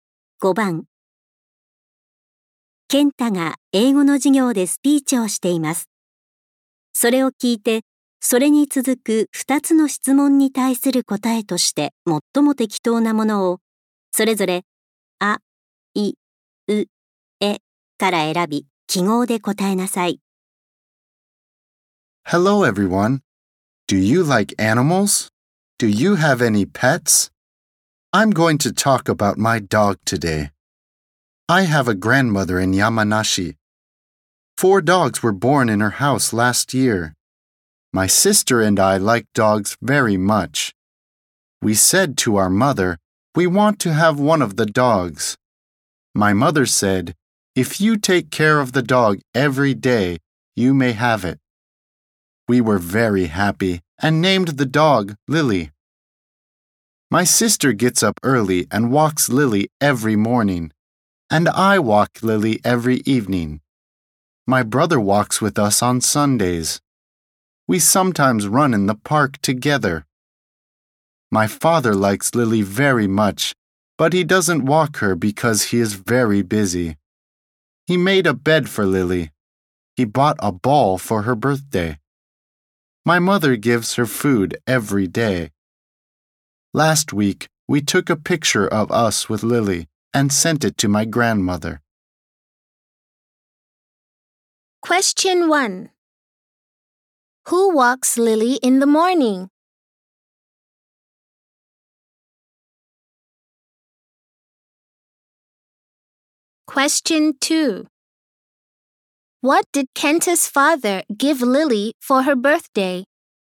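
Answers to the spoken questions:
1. Kenta's sister
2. A ball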